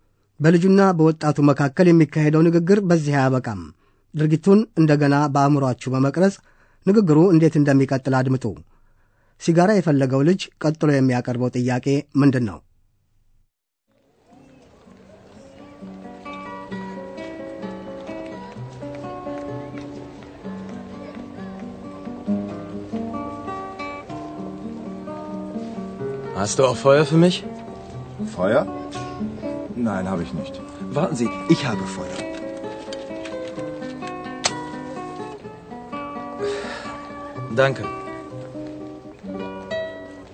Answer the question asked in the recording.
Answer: አንድ ሰው ሲጋራ ለማጤስ እሳት ያስፈልገዋል።